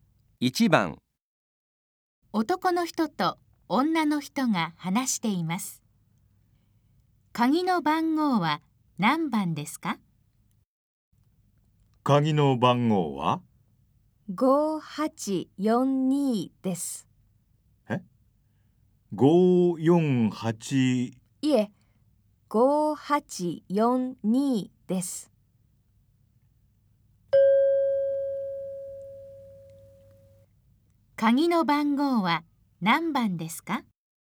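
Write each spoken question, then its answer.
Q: 鍵の番号は何番ですか?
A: 5842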